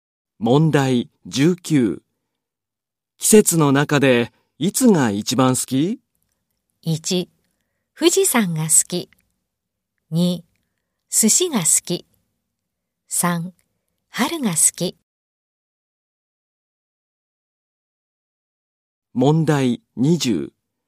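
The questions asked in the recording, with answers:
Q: 季節の中でいつが一番好き?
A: 2: 春が好き。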